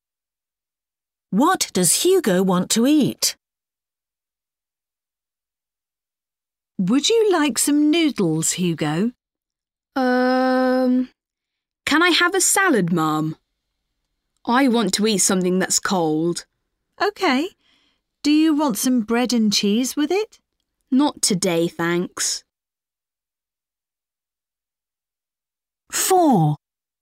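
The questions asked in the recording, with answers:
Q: What does Hugo want to eat?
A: A salad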